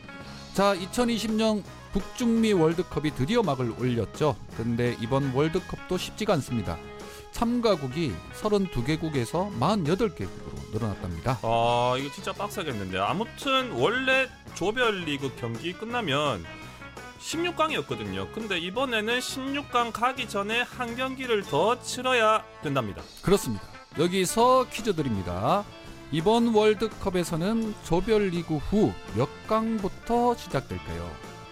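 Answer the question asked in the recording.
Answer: 32강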